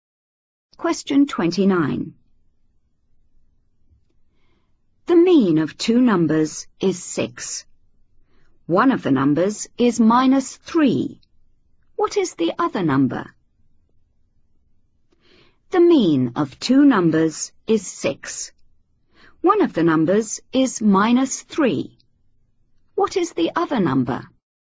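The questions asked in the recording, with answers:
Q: What is the other number?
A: 15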